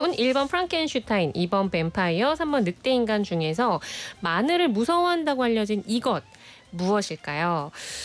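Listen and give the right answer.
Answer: 2번: 뱀파이어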